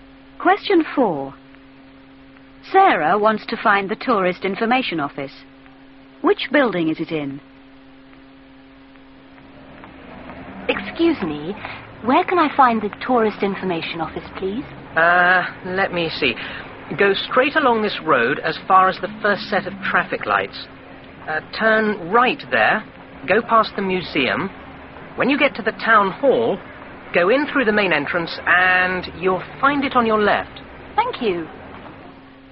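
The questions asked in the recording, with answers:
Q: Which building is it in?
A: The town hall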